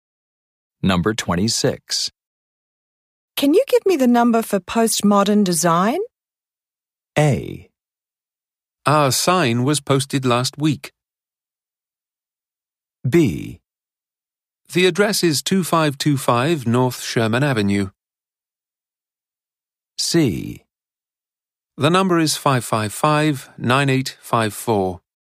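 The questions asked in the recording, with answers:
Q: Can you give me the number for postmodern design?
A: C: The number is 555-9854.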